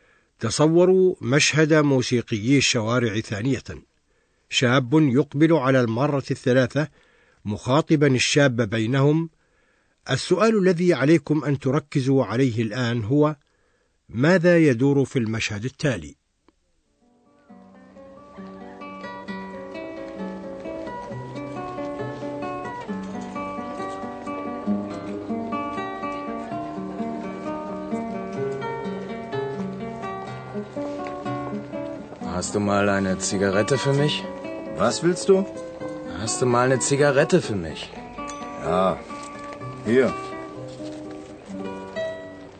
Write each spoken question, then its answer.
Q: ماذا يدور في المشهد التالي؟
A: هذا المشهد يري أن شابا يريد سيجارة